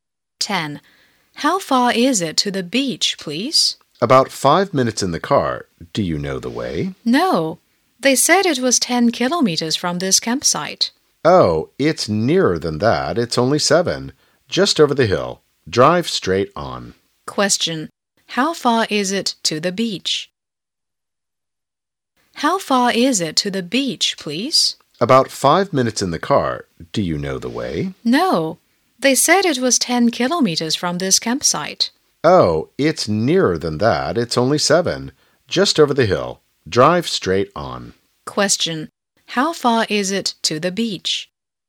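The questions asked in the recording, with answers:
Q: How far is it to the beach?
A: 7 kilometers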